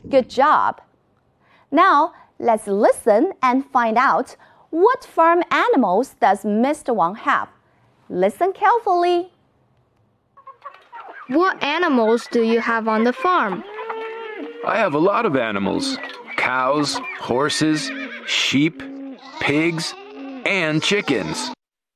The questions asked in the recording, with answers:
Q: what farm animals does Mr. Wang have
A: He has cows, horses, chickens, pigs, and sheep.